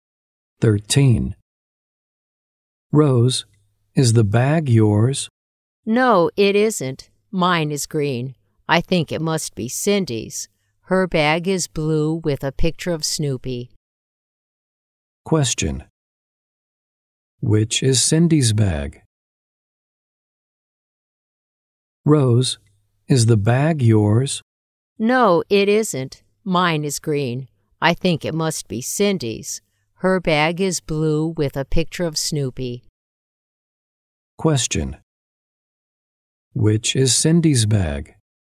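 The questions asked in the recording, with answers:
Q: Which is Cindy's bag?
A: The blue one with a picture of Snoopy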